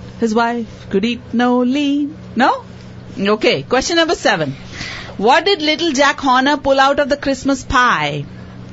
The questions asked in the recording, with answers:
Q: What did little Jack Horner pull out of the Christmas pie?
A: He put in his thumb and pulled out a plum.